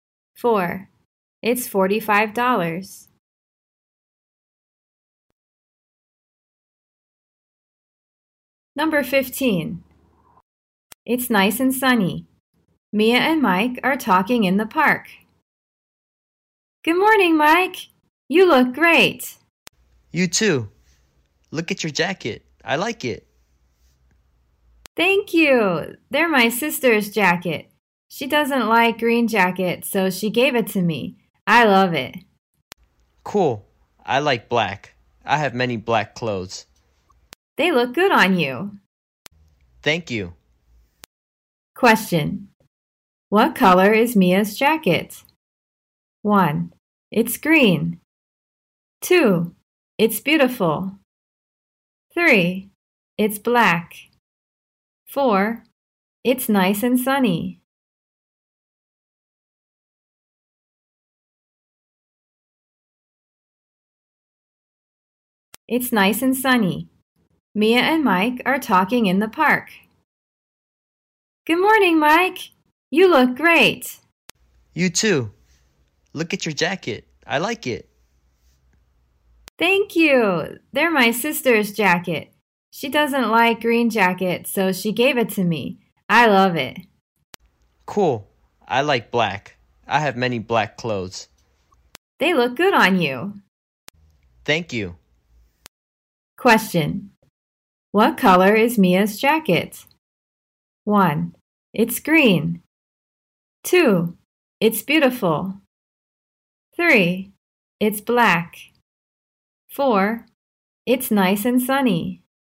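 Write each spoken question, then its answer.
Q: What color is Mia's jacket?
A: 1: It's green.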